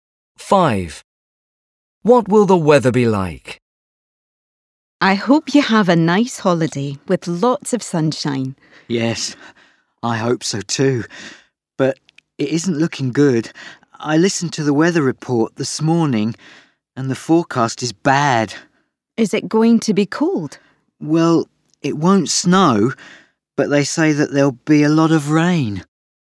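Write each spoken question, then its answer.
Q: What will the weather be like?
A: Rainy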